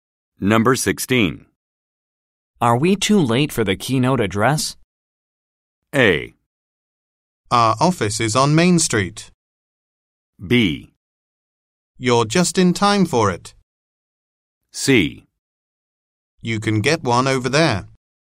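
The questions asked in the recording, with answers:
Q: Are we too late for the keynote address?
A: B: You're just in time for it.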